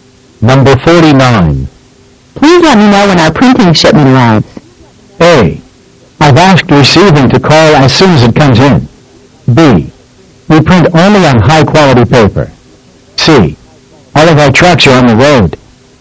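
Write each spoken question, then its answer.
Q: Please let me know when our printing shipment arrives.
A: A: I've asked receiving to call as soon as it comes in.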